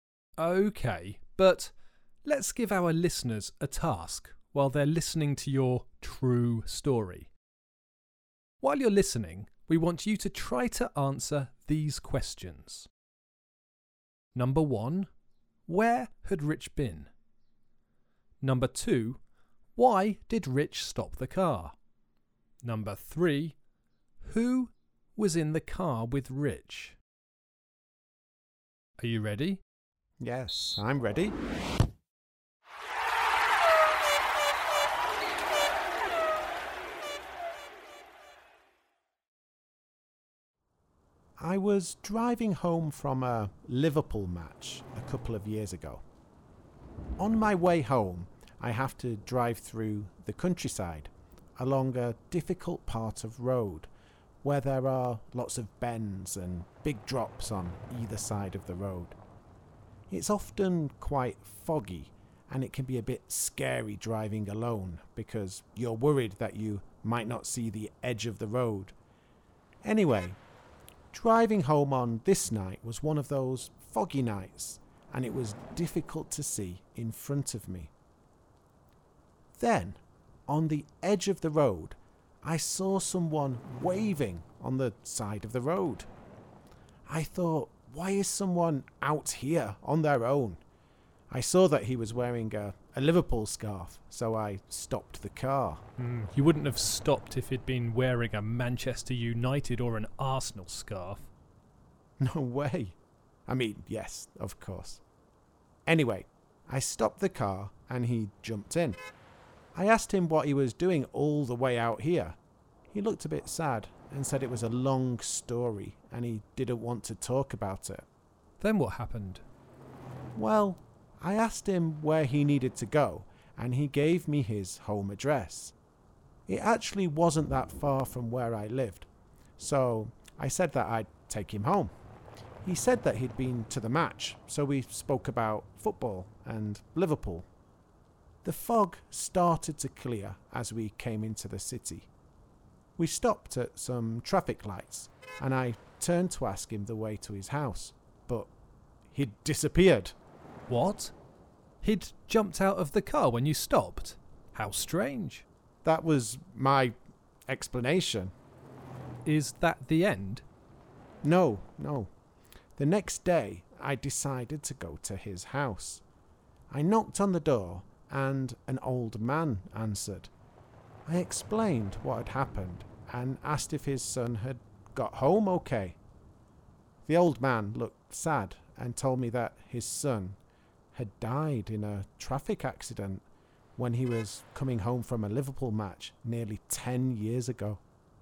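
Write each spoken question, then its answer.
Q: where had Rich been?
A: At a Liverpool match

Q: why did Rich stop the car?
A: He saw a man waving on the side of the road wearing a Liverpool scarf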